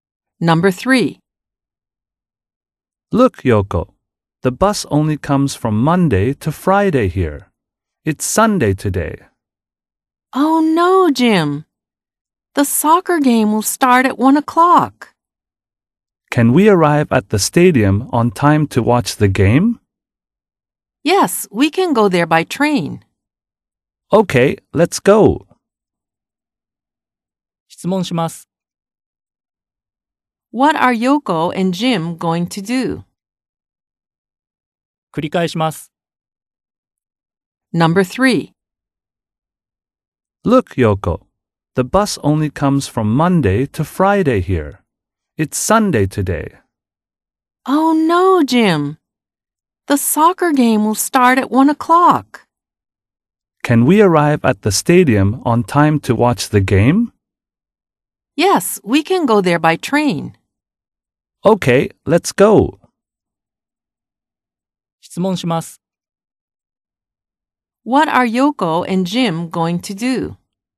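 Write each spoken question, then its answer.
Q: What are Yoko and Jim going to do?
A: Go to the stadium by train to watch the soccer game.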